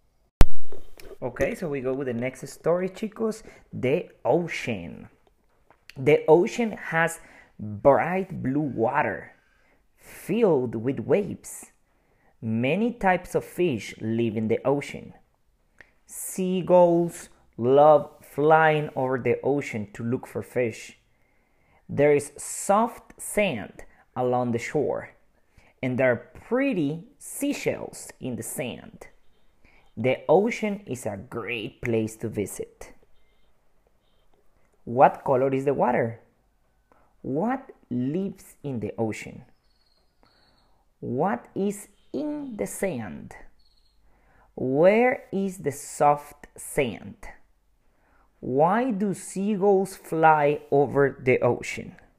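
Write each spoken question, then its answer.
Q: What color is the water?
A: bright blue

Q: What lives in the ocean?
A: many types of fish

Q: What is in the sand?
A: pretty seashells

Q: Where is the soft sand?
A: along the shore

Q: Why do seagulls fly over the ocean?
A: to look for fish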